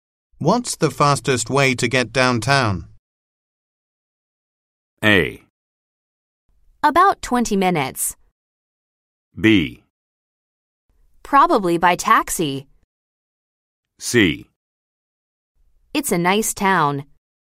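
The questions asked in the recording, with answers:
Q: What's the fastest way to get downtown?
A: B: Probably by taxi.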